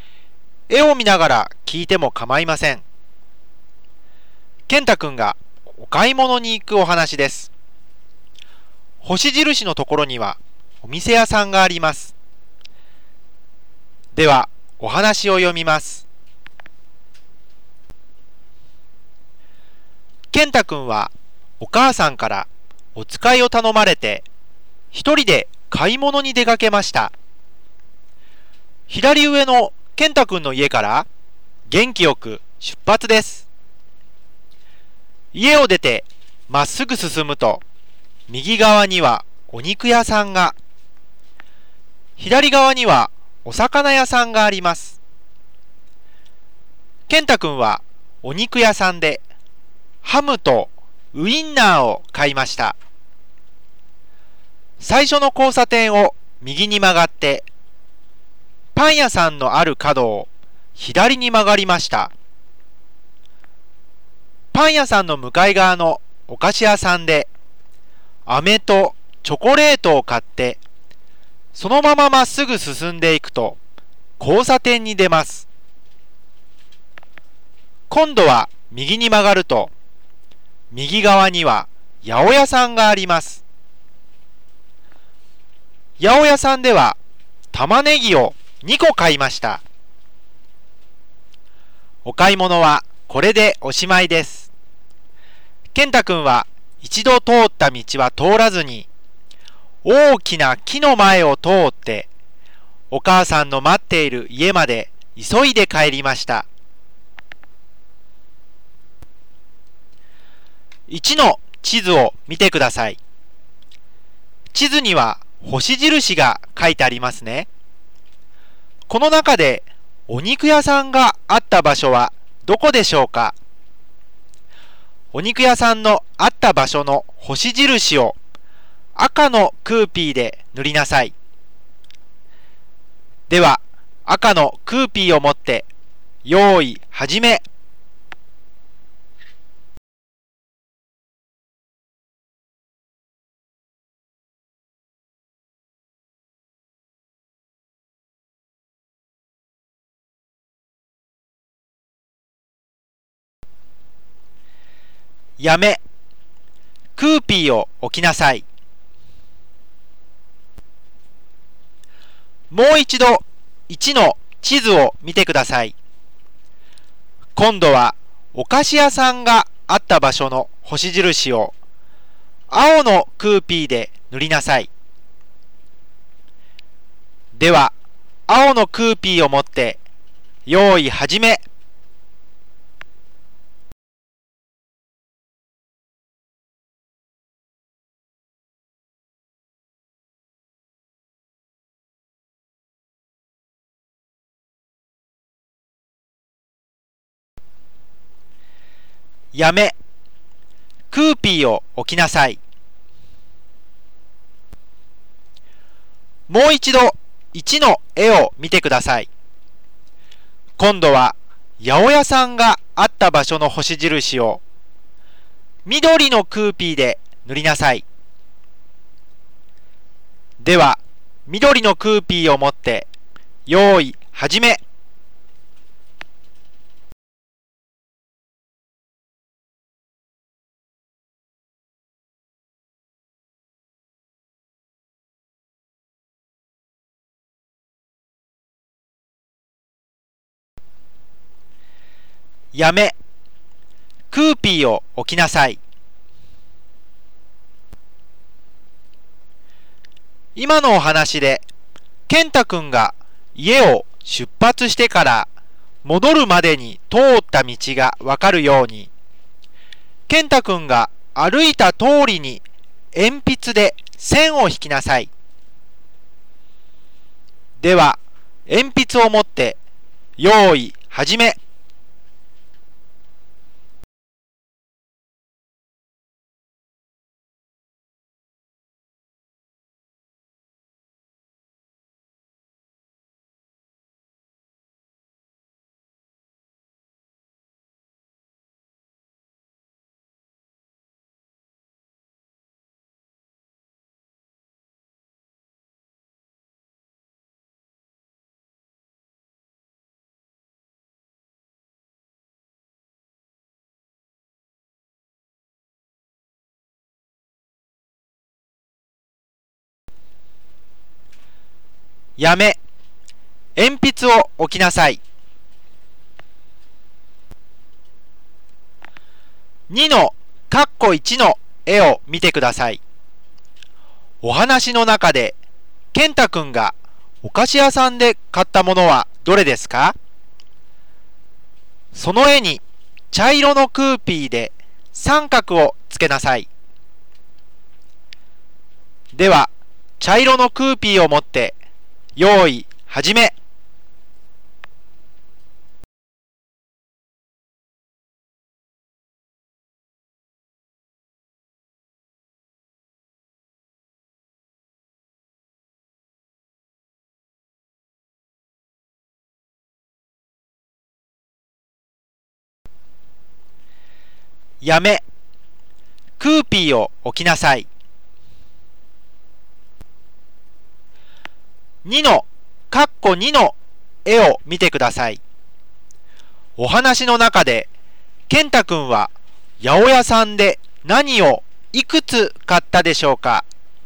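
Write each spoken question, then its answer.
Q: お話の中で健太くんがお菓子屋さんで買ったものはどれですか?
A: 飴とチョコレート

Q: お話の中で健太くんは八百屋さんで何をいくつ買ったでしょうか?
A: 玉ねぎを2個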